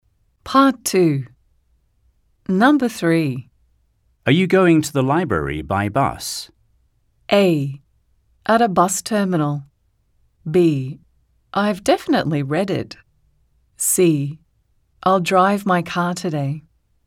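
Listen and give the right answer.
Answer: C: I'll drive my car today.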